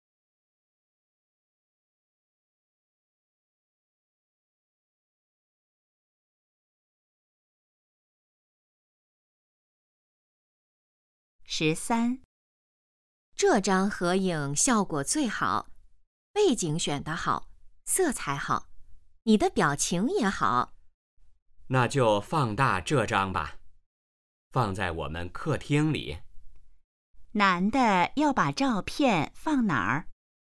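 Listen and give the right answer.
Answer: 客厅里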